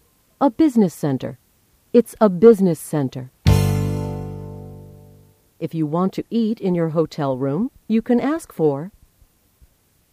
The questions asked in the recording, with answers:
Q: If you want to eat in your hotel room, you can ask for...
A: Room service. You can ask for room service.